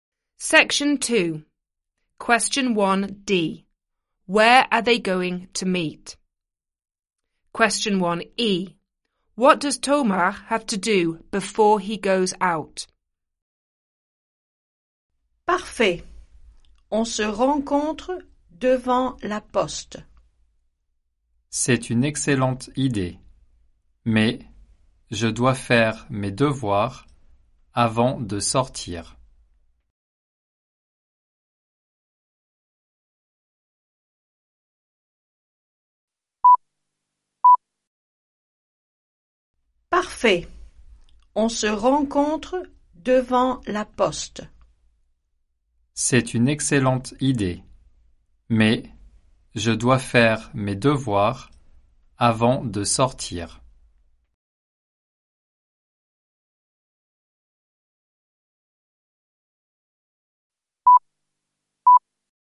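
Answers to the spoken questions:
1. In front of the post office
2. His homework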